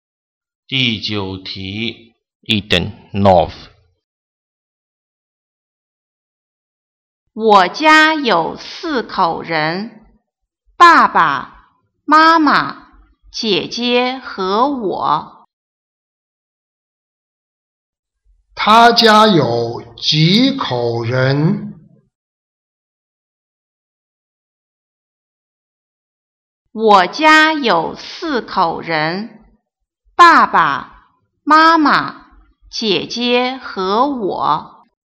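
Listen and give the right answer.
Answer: 四口人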